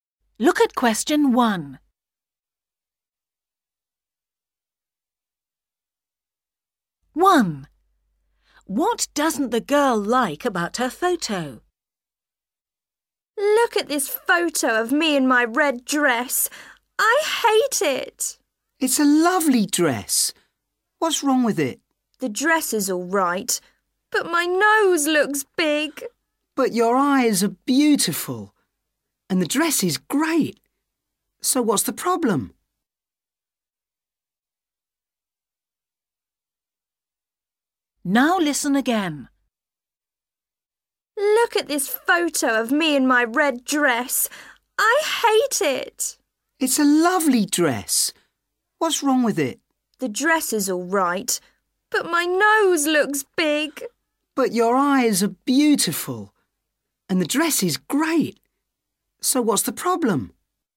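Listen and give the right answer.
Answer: her nose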